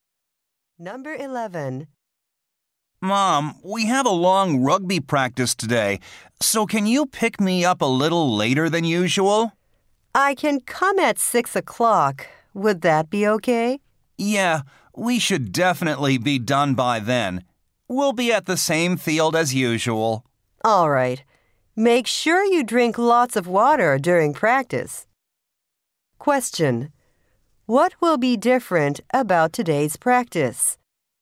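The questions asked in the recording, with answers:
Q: What will be different about today's practice?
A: It will be longer than usual.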